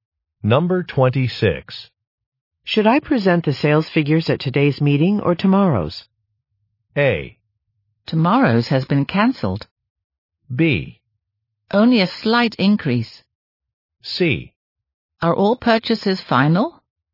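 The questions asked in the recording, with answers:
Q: Should I present the sales figures at today's meeting or tomorrow's?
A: A: Tomorrow's has been cancelled.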